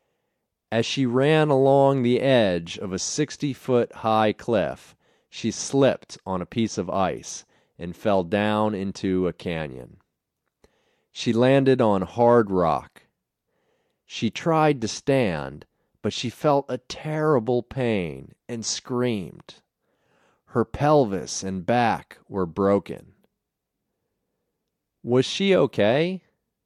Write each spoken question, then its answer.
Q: Was she okay?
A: No, she wasn't okay. Her pelvis and back were broken.